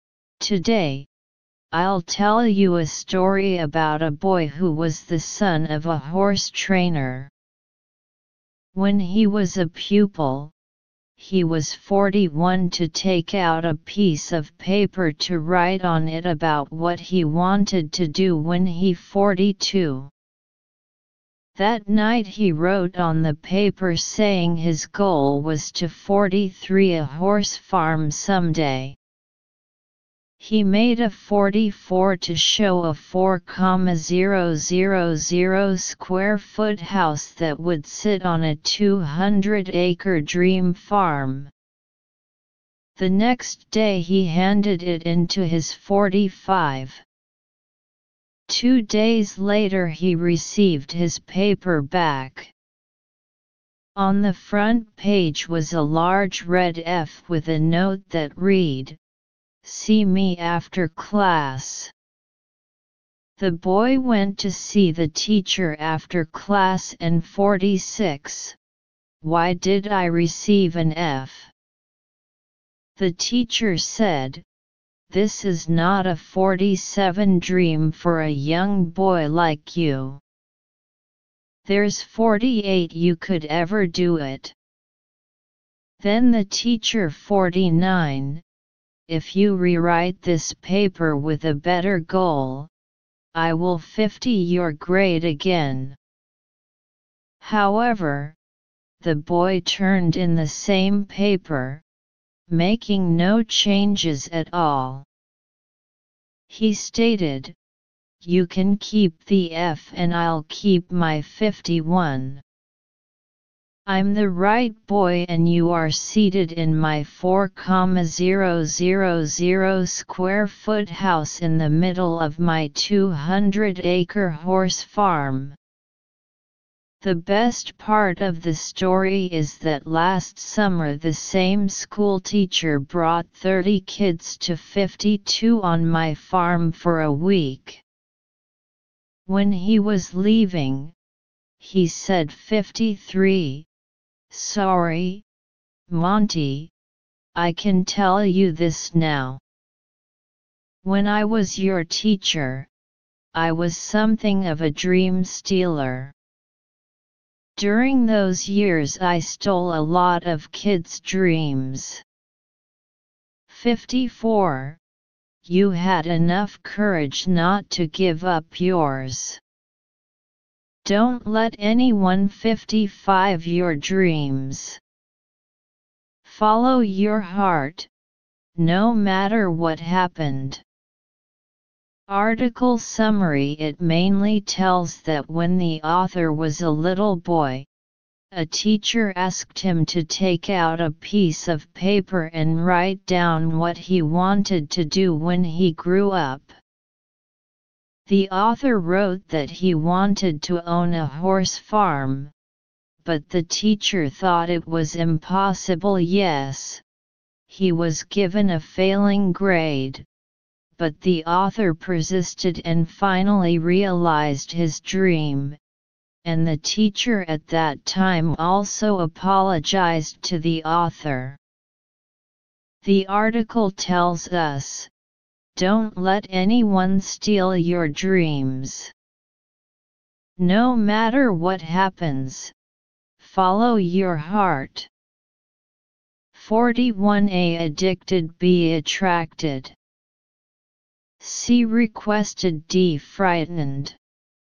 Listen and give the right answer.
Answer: Analysis: choose C sentence meaning.